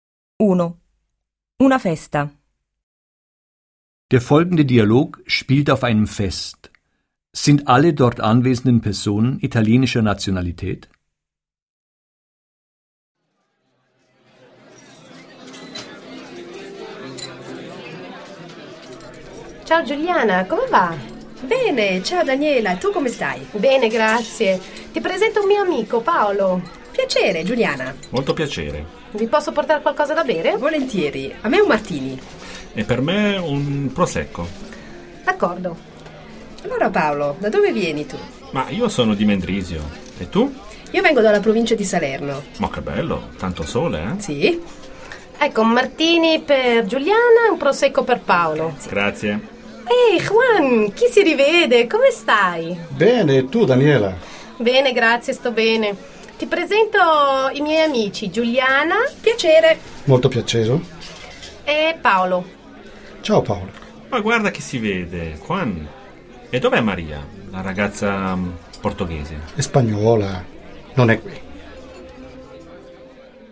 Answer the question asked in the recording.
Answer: Nein, nicht alle Personen auf dem Fest sind italienischer Nationalität.